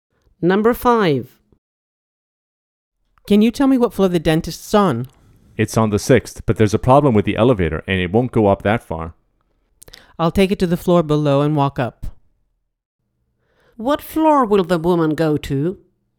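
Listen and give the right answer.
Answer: the 5th floor, then walk to the 6th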